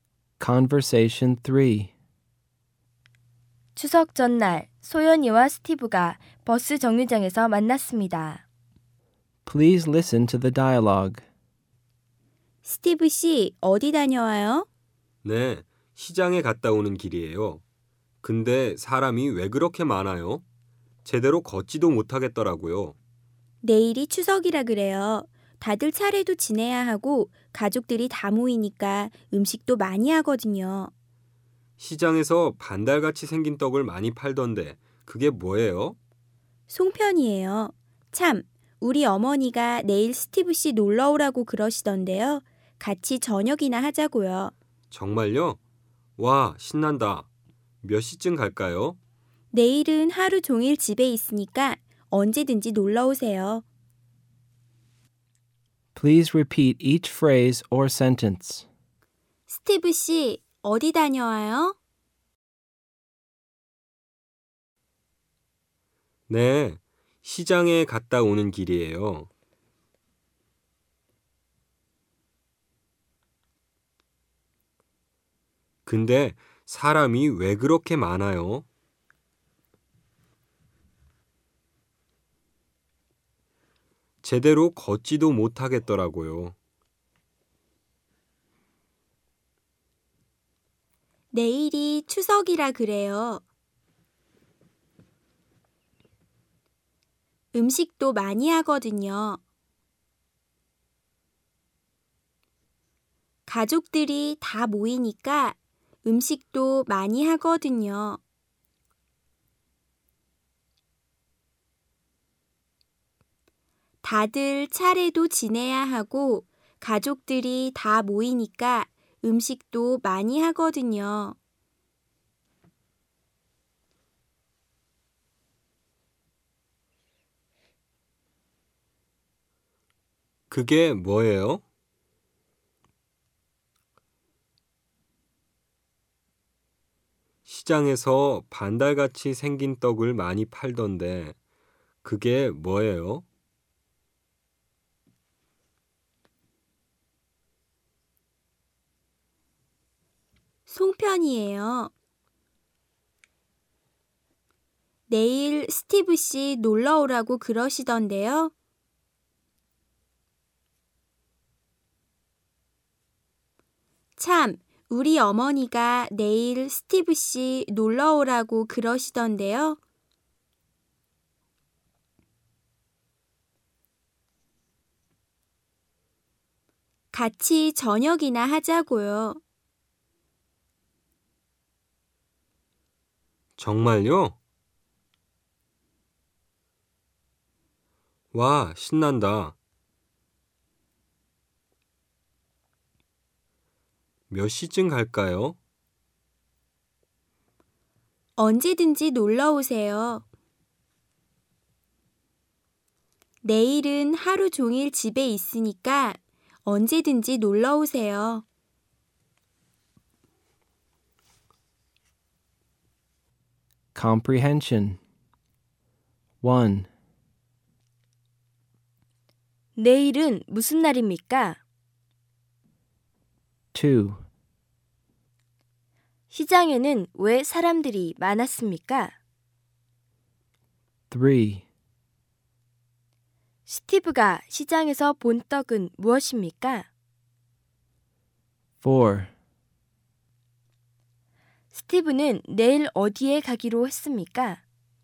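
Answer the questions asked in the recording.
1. 추석
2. 내일이 추석이라 차례를 지내고 가족들이 모여 음식을 많이 하니까
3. 송편
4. 소연이네 집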